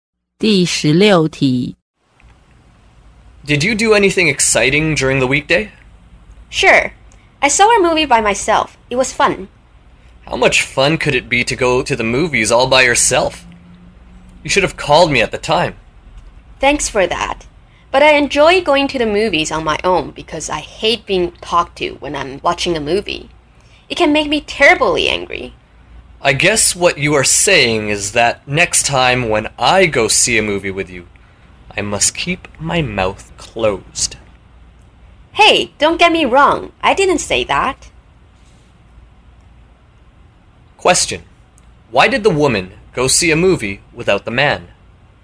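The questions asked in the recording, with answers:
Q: Why did the woman go see a movie without the man?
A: She hates being talked to while watching a movie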